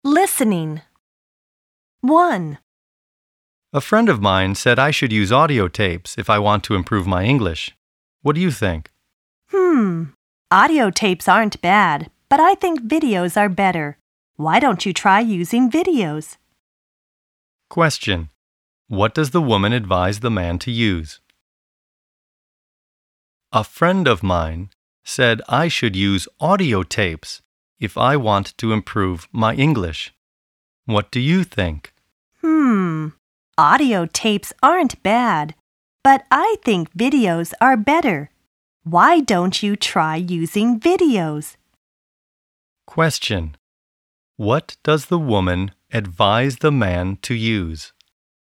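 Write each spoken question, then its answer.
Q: What does the woman advise the man to use?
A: Videos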